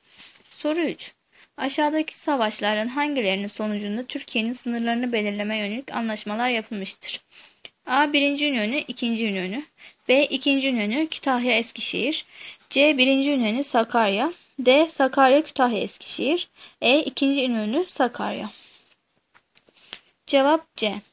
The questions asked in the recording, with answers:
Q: Aşağıdaki savaşların hangilerinin sonucunda Türkiye'nin sınırlarını belirlemeye yönelik anlaşmalar yapılmıştır?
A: Cevap C.